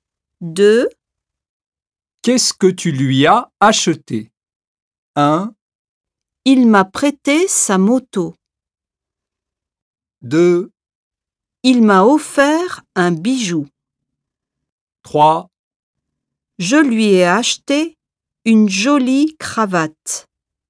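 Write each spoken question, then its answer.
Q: Qu'est-ce que tu lui as acheté ?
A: 3: Je lui ai acheté une jolie cravate.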